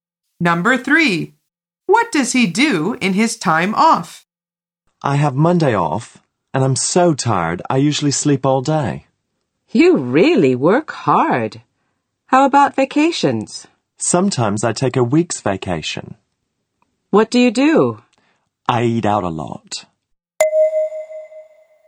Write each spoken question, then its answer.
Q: what does he do in his time off?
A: The answer is he sleeps a lot.